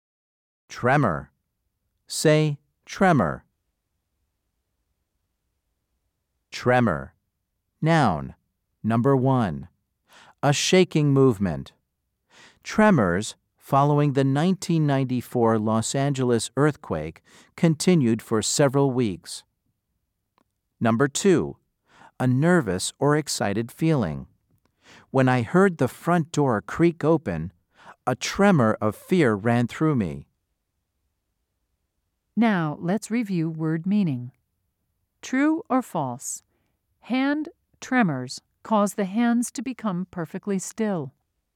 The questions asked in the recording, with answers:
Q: True or false? Hand tremors cause the hands to become perfectly still.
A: If you said false, you are correct.